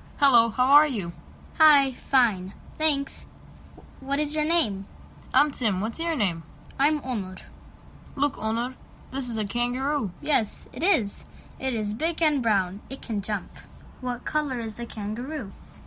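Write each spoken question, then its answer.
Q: What color is the kangaroo?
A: Brown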